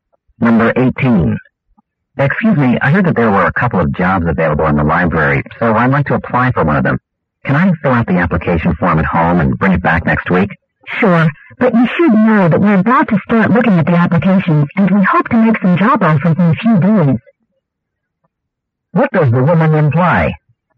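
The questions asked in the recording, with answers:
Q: What does the woman imply?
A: He should return the application soon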